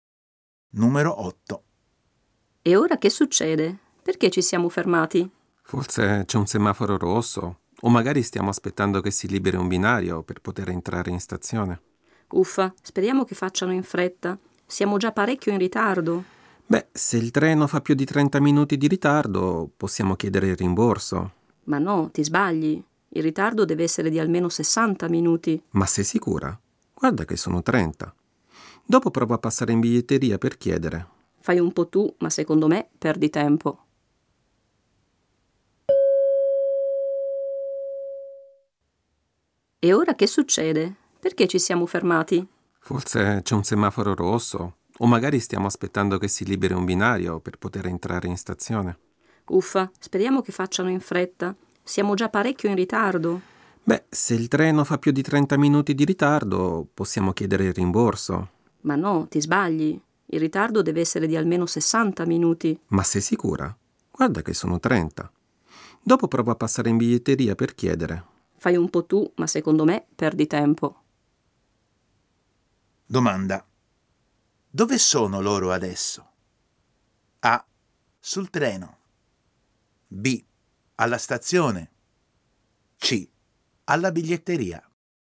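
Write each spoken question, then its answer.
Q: Dove sono loro adesso?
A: A: sul treno.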